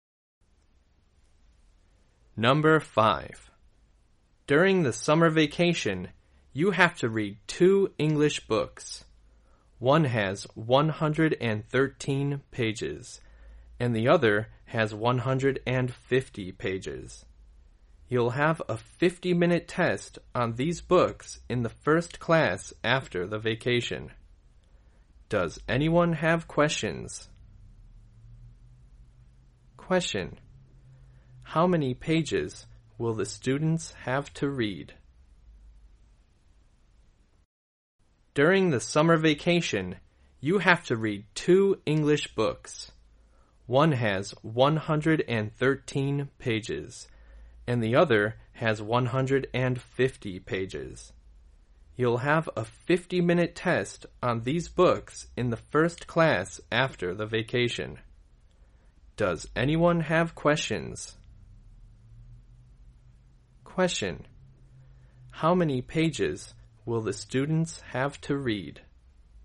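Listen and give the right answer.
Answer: 263 pages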